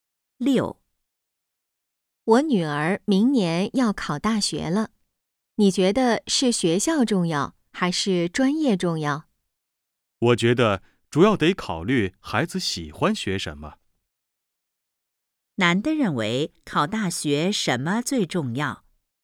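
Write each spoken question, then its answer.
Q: 男的认为考大学什么最重要?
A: 孩子喜欢学什么(孩子的兴趣)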